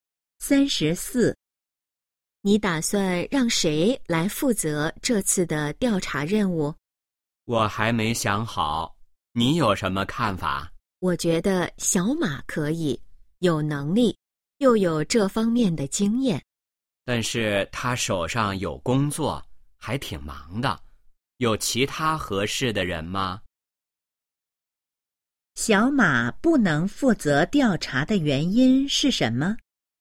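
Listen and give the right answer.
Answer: 他手上有工作,很忙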